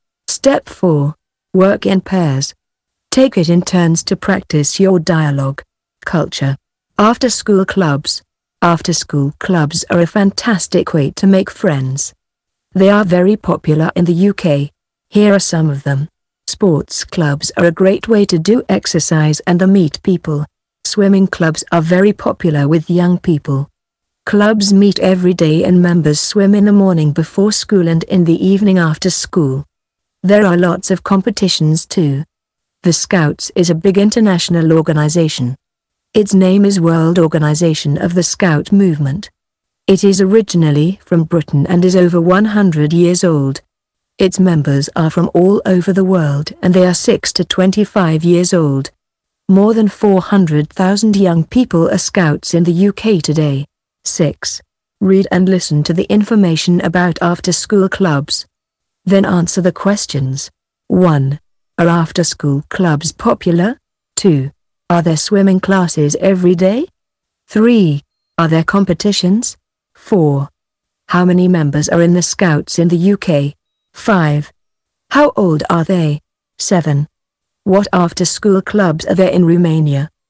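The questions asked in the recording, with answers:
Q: Are after-school clubs popular?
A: Yes, they are very popular in the UK.

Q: Are there swimming classes every day?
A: Yes, clubs meet every day.

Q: Are there competitions?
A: Yes, there are lots of competitions.

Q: How many members are in the Scouts in the UK?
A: More than 400,000

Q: How old are they?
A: 6 to 25 years old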